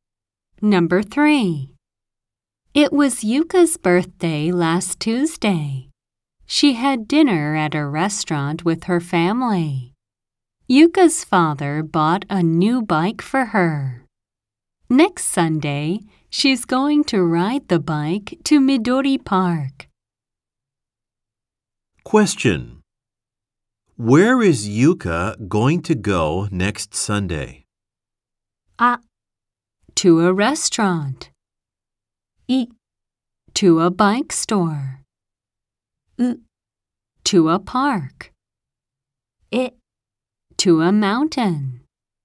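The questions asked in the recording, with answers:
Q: Where is Yuka going to go next Sunday?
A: う: To a park.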